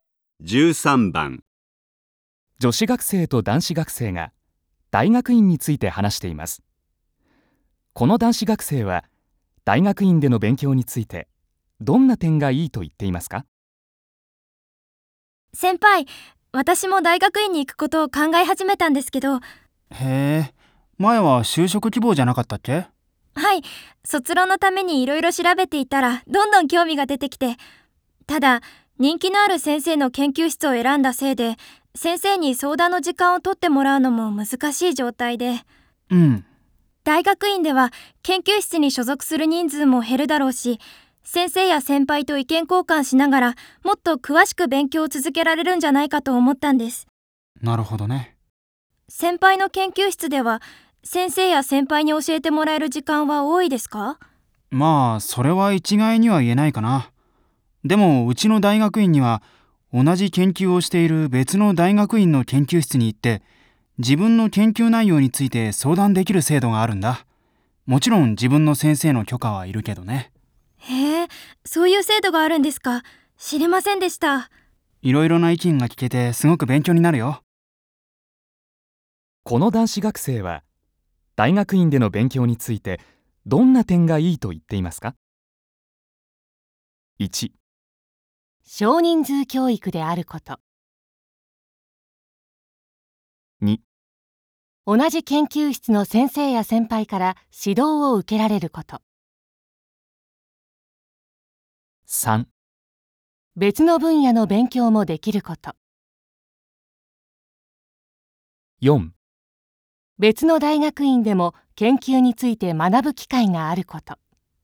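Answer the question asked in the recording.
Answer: 4: 別の大学院でも研究について学ぶ機会があること。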